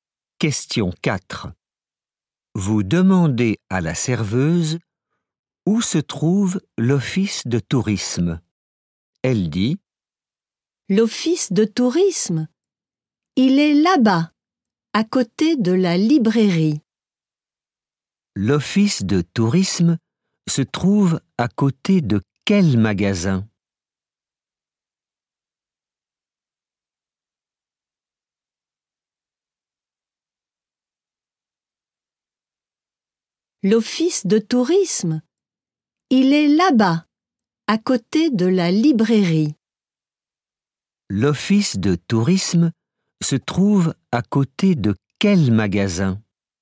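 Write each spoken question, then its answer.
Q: L'office de tourisme se trouve à côté de quel magasin ?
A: la librairie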